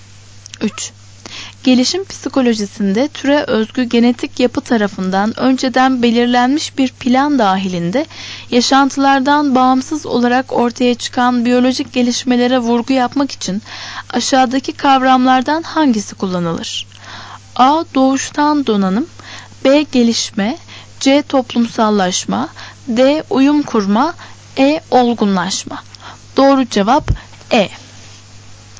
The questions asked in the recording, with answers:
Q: Gelişim psikolojisinde türe özgü genetik yapı tarafından önceden belirlenmiş bir plan dahilinde yaşantılardan bağımsız olarak ortaya çıkan biyolojik gelişmelere vurgu yapmak için aşağıdaki kavramlardan hangisi kullanılır?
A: Doğru cevap E.